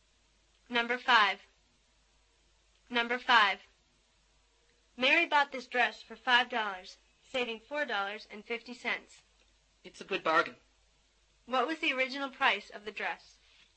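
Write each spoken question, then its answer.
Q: What was the original price of the dress?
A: $9.50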